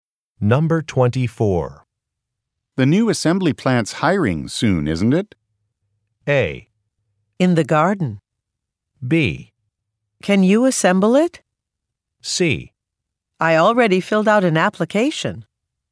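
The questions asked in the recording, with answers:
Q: The new assembly plant's hiring soon, isn't it?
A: C: I already filled out an application.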